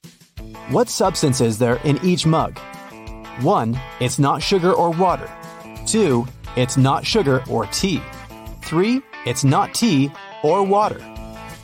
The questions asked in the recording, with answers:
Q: What substance is there in each mug?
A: The first mug contains tea.